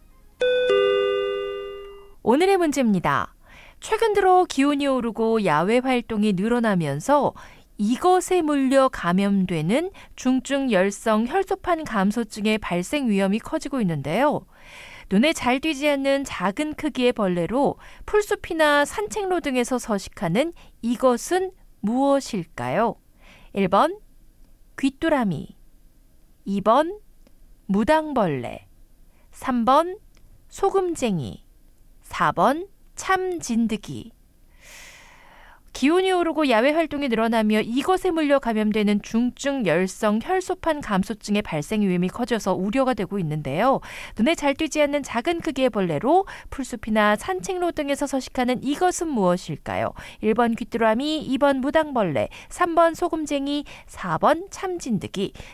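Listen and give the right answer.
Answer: 4: 참진드기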